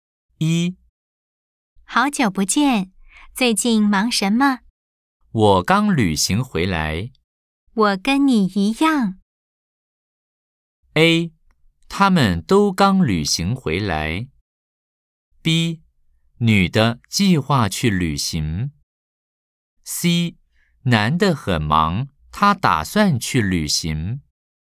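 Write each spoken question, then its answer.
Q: A. 他们都刚旅行回来。B. 女的计划去旅行。C. 男的很忙,他打算去旅行。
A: A: 他们都刚旅行回来。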